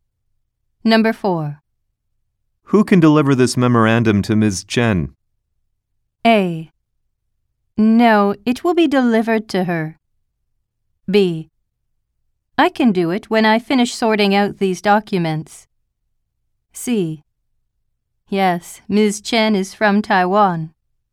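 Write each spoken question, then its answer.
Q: Who can deliver this memorandum to Ms. Chen?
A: B: I can do it when I finish sorting out these documents.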